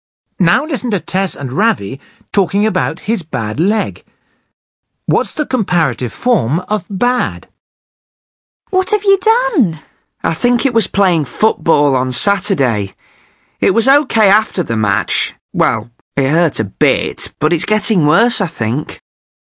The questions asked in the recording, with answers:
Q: What's the comparative form of bad?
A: Ravi says his leg is getting worse.